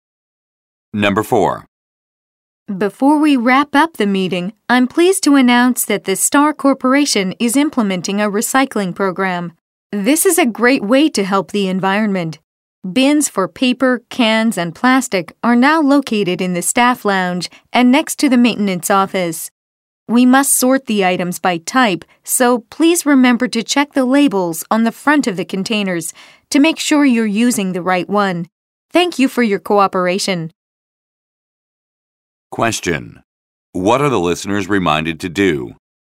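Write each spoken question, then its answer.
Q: What are the listeners reminded to do?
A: Check the labels on the front of the containers to sort items correctly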